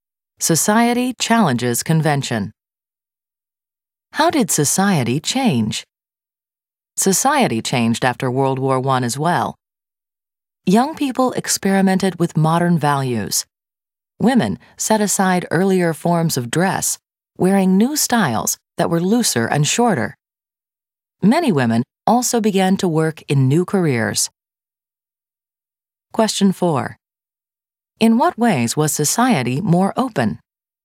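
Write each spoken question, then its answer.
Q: In what ways was society more open?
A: Young people tried modern values; women wore looser, shorter clothes and began working in new careers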